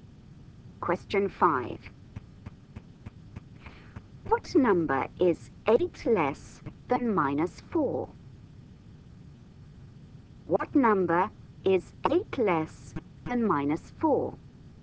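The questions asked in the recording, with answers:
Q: What number is 8 less than minus 4?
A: -12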